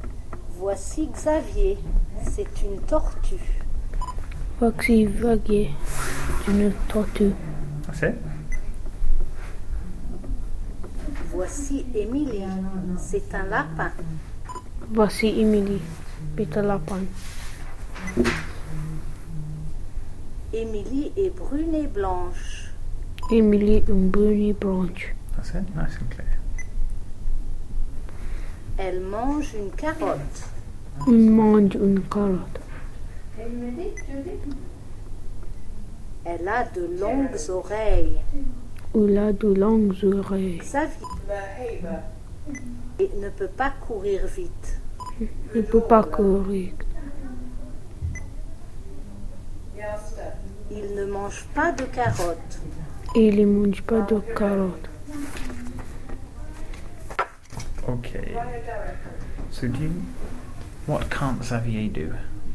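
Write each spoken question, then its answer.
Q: what can't Xavier do?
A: Run fast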